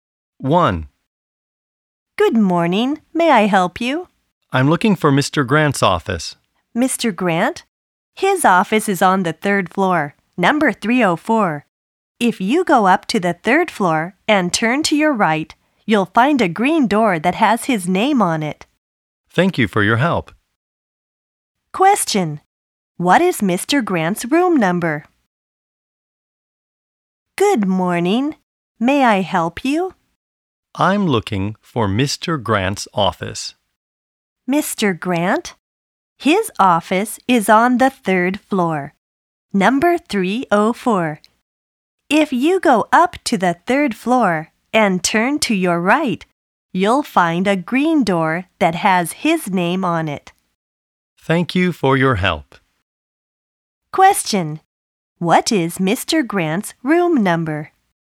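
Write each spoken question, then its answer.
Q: What is Mr. Grant's room number?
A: 304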